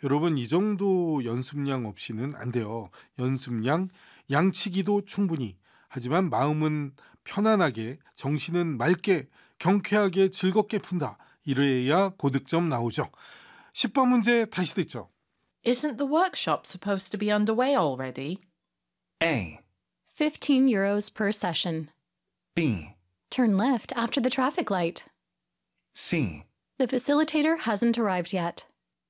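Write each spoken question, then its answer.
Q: Isn't the workshop supposed to be underway already?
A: C: The facilitator hasn't arrived yet.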